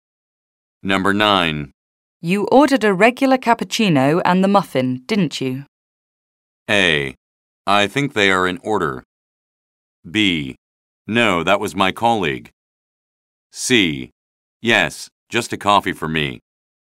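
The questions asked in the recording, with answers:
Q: You ordered a regular cappuccino and the muffin, didn't you?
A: B: No, that was my colleague.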